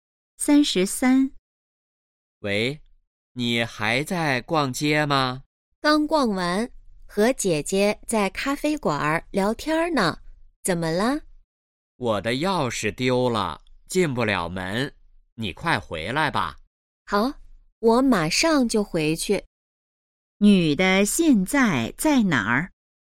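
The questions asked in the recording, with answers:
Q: 女的现在在哪儿?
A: 咖啡馆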